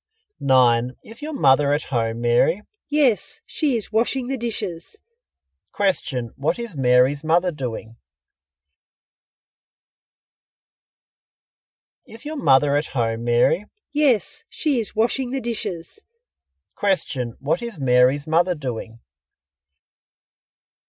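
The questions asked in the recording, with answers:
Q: Question. What is Mary's mother doing?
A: Washing the dishes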